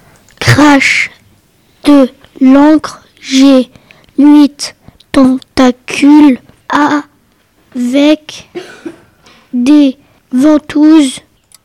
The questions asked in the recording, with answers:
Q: Je crache de l'encre, j'ai 8 tentacules avec des ventouses.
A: Je suis la pieuvre.